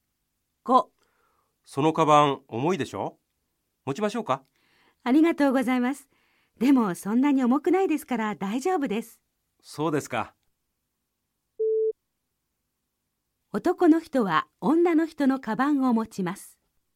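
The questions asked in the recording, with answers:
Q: 男の人は女の人のカバンを持ちます。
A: ×(重くないから大丈夫と断りました)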